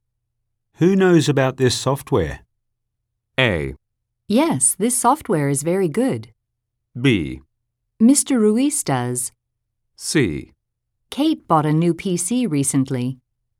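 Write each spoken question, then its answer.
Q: Who knows about this software?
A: B: Mr. Ruiz does.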